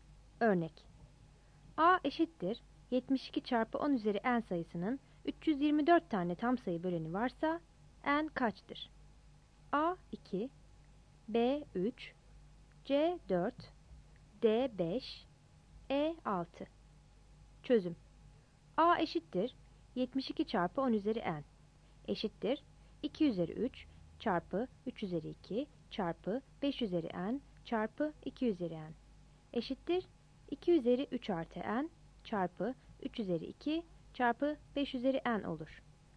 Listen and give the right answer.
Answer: Yanıt D'dir.